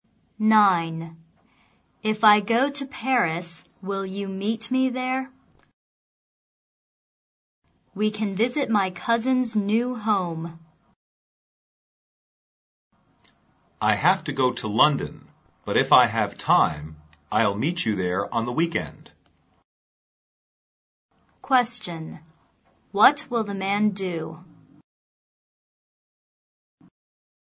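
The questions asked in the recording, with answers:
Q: What will the man do?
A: Go to London and meet her in Paris on the weekend if he has time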